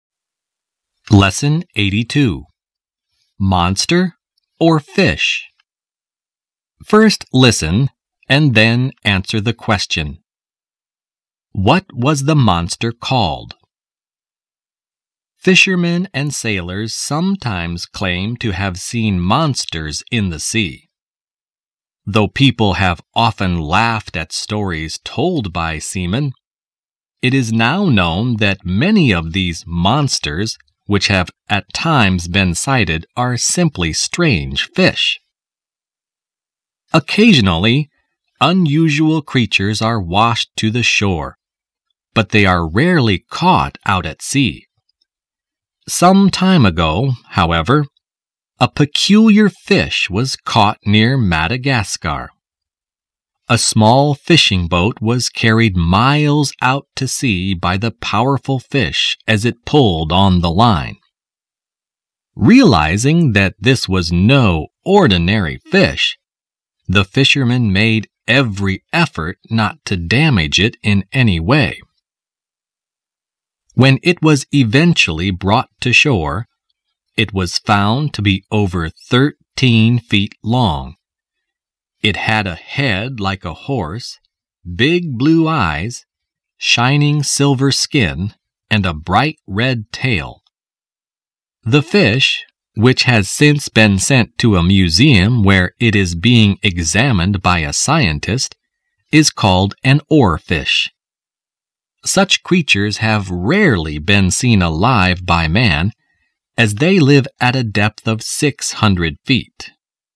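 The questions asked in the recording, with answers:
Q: What was the monster called?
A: An oarfish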